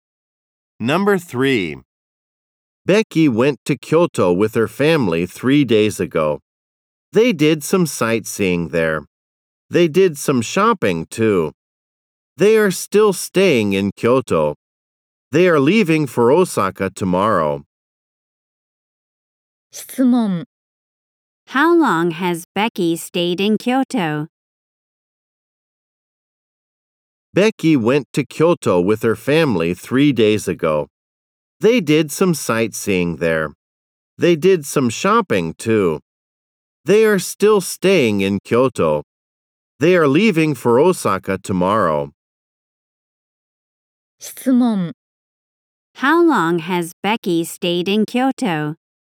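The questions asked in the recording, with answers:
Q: How long has Becky stayed in Kyoto?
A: For three days.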